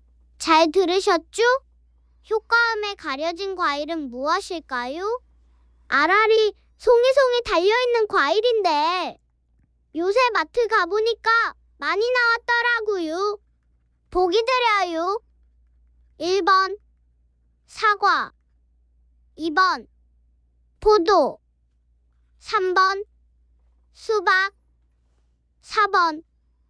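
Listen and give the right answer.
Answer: 2번: 포도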